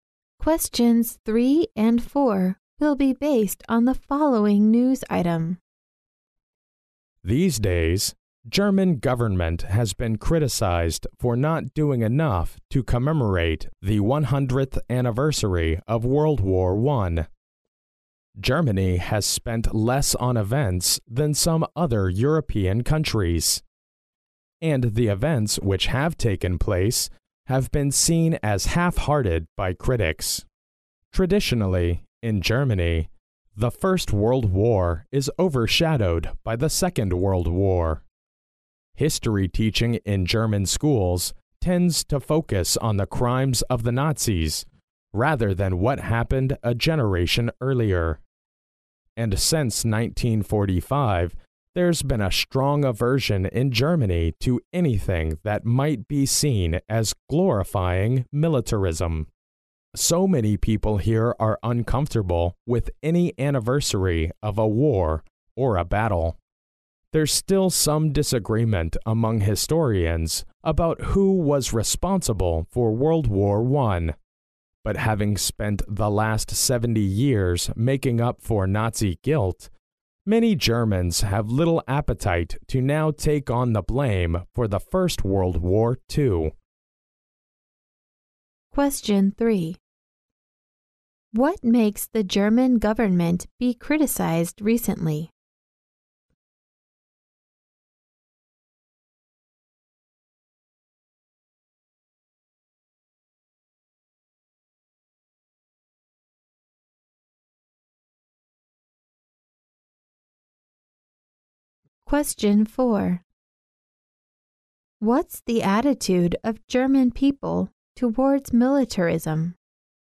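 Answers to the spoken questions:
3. Not doing enough to commemorate the 100th anniversary of World War I
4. A strong aversion to anything that might be seen as glorifying it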